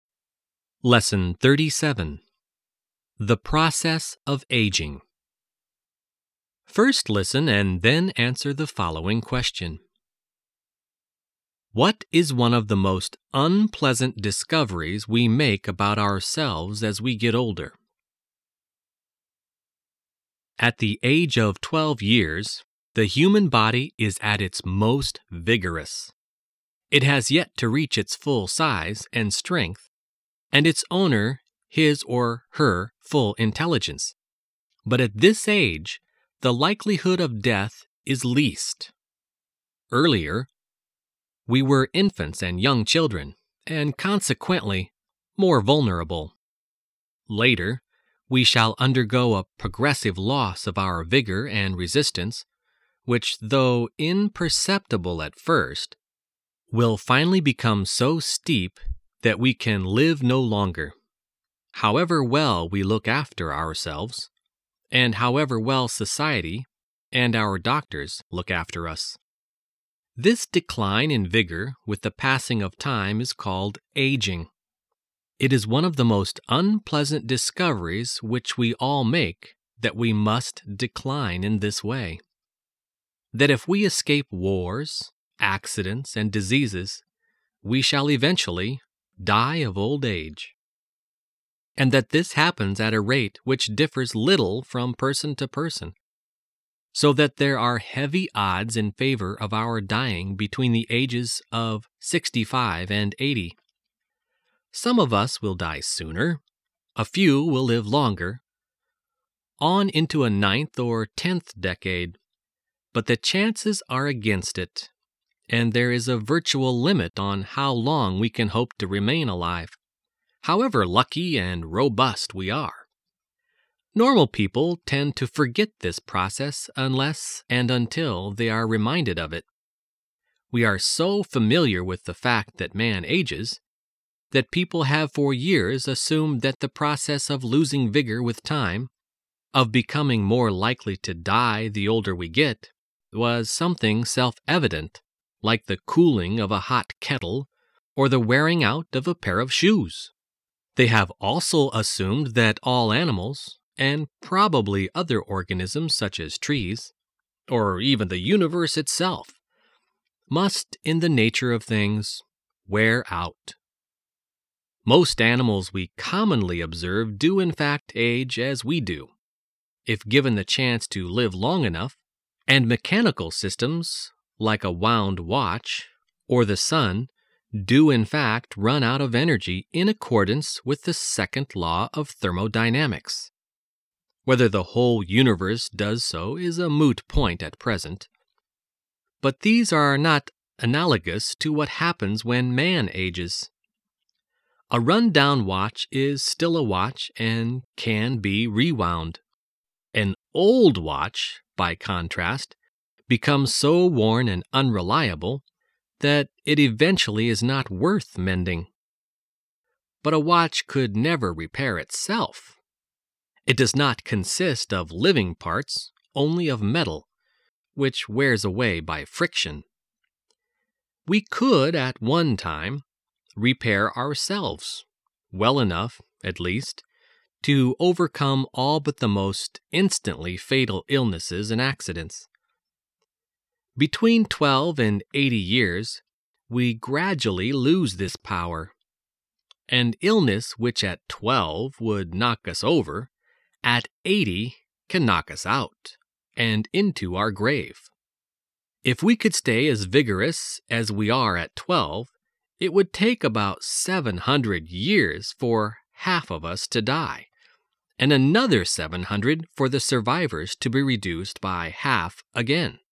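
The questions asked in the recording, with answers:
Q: What is one of the most unpleasant discoveries we make about ourselves as we get older?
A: That we must decline in vigor with age and will eventually die of old age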